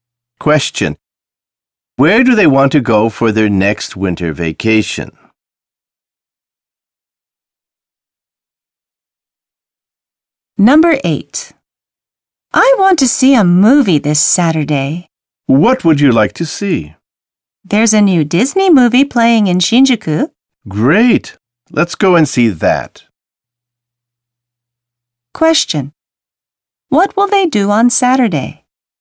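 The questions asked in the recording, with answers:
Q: What will they do on Saturday?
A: See a new Disney movie in Shinjuku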